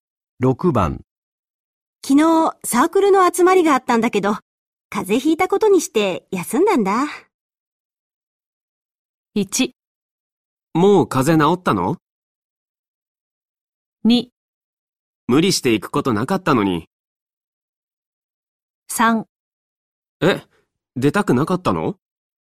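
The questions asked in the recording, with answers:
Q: 昨日サークルの集まりがあったんだけど、風邪ひいたことにして休んだんだ。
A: 3: え、出たくなかったの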